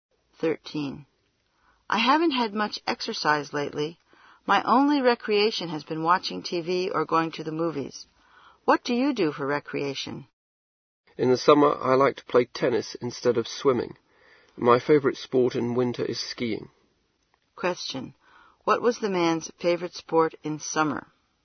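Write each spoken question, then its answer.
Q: What was the man's favorite sport in summer?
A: Tennis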